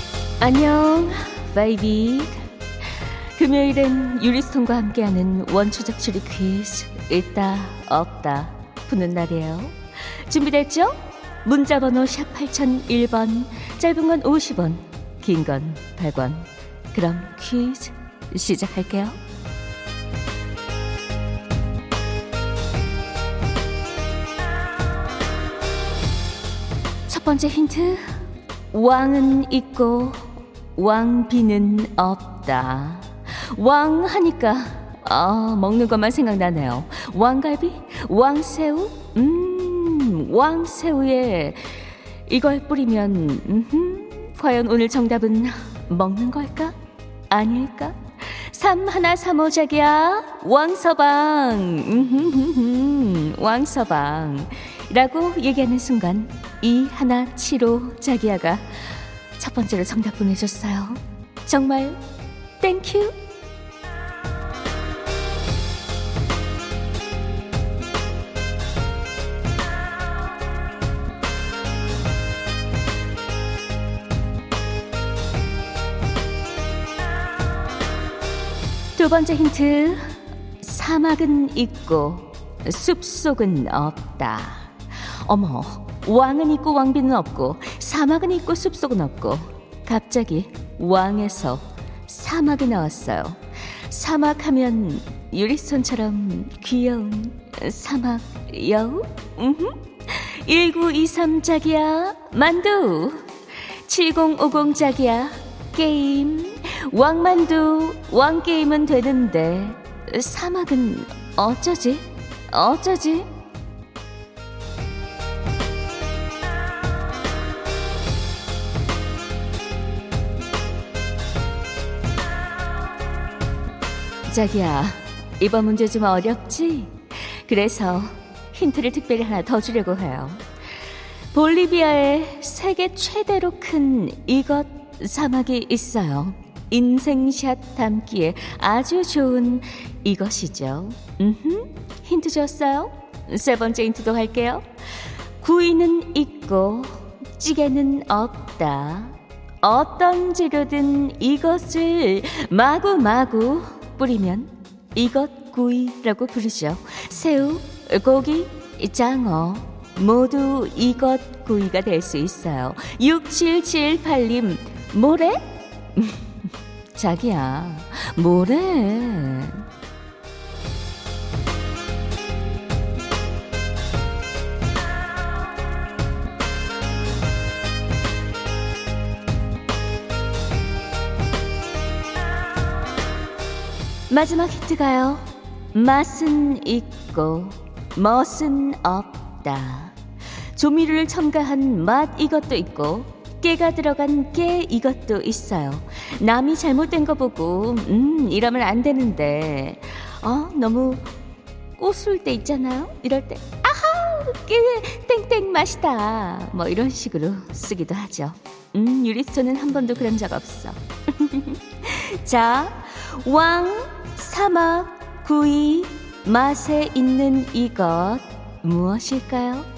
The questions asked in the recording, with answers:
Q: 자 왕. 사막, 구이, 맛에 있는 이것 무엇일까요?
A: 소금이네요